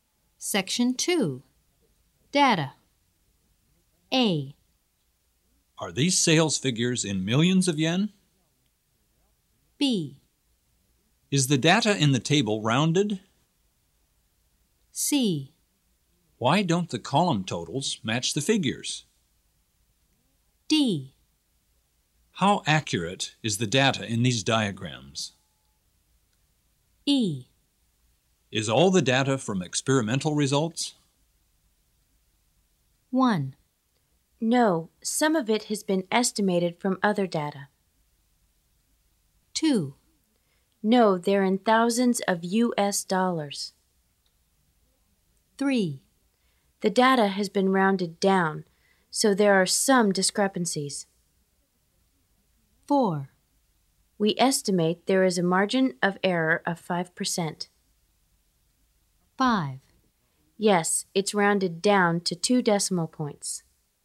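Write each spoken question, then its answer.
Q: Are these sales figures in millions of yen?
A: 2: No, they're in thousands of U.S. dollars.

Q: Is the data in the table rounded?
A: 5: Yes, it's rounded down to 2 decimal points.

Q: Why don't the column totals match the figures?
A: 3: The data has been rounded down, so there are some discrepancies.

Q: How accurate is the data in these diagrams?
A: 4: We estimate there is a margin of error of 5%.

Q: Is all the data from experimental results?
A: 1: No, some of it has been estimated from other data.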